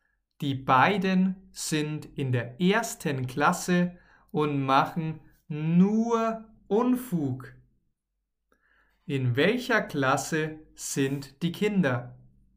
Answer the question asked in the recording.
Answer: In der ersten Klasse.